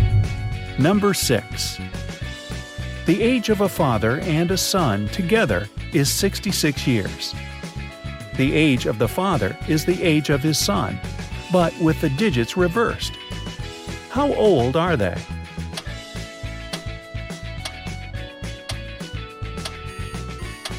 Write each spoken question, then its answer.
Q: How old are they?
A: 51 and 15, 42 and 24, 60 and 6.